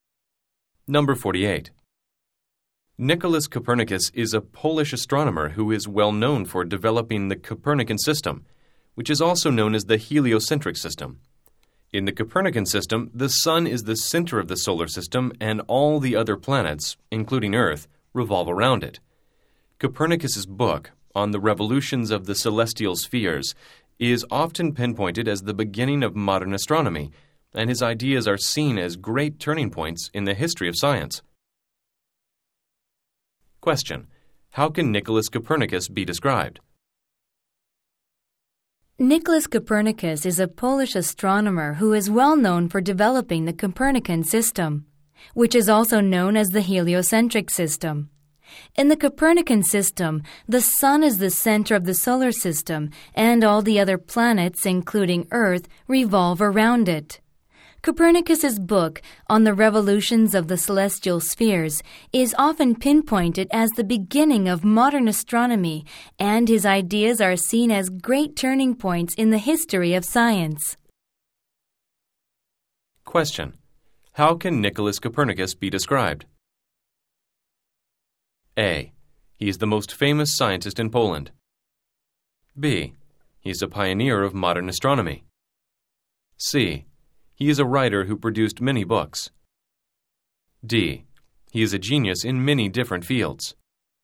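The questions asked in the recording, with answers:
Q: How can Nicholas Copernicus be described?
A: B: He is a pioneer of modern astronomy.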